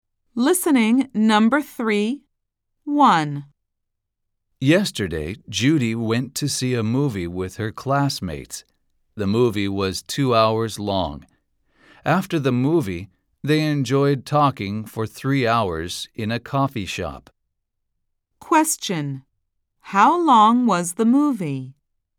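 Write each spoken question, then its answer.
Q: How long was the movie?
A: 2 hours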